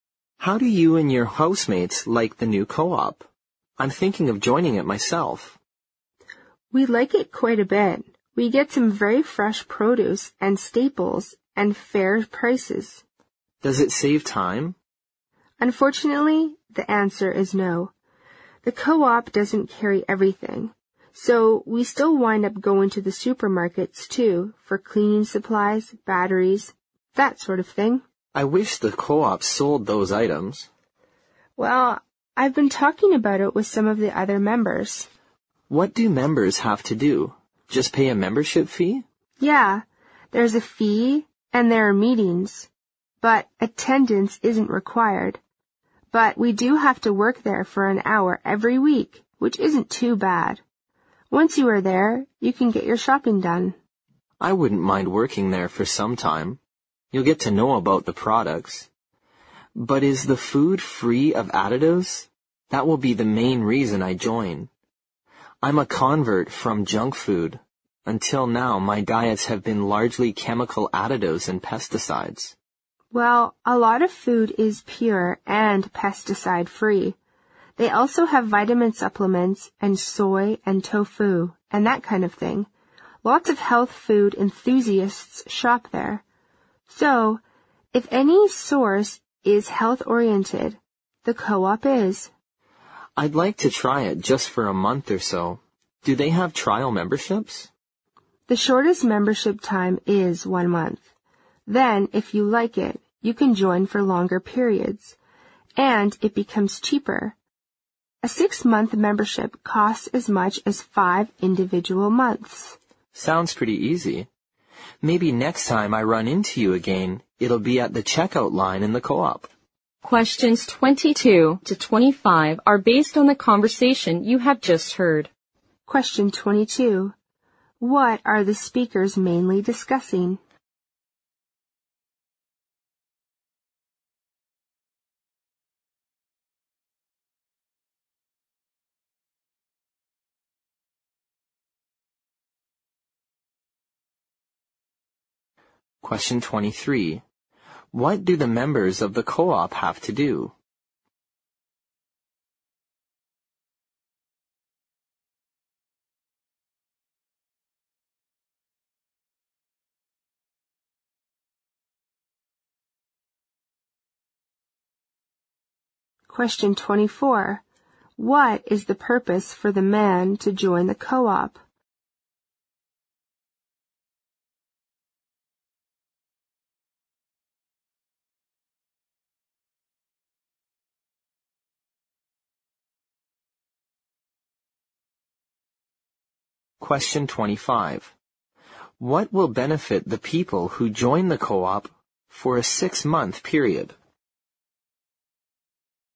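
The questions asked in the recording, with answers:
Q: What are the speakers mainly discussing?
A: A food co-op the man is thinking of joining

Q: What do the members of the co-op have to do?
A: Pay a membership fee and work there an hour every week

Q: What is the purpose for the man to join the co-op?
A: To get food free of additives (healthier food)

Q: What will benefit the people who join the co-op for a 6-month period?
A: It costs less: 6 months for the price of 5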